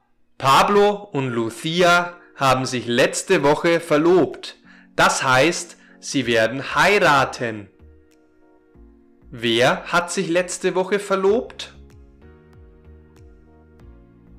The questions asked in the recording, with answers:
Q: Wer hat sich letzte Woche verlobt?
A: Pablo und Lucia. Pablo und Lucia haben sich letzte Woche verlobt.